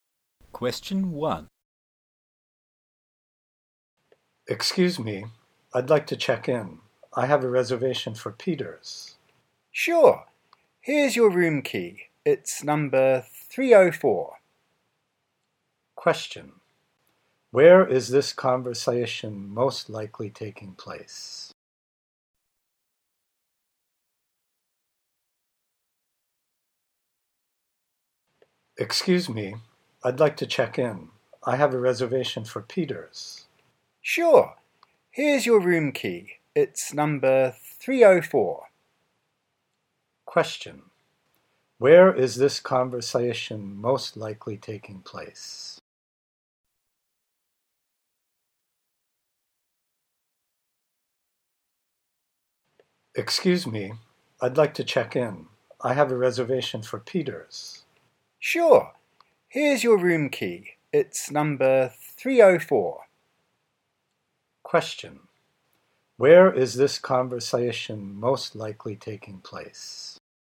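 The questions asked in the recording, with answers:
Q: Where is this conversation most likely taking place?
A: At a hotel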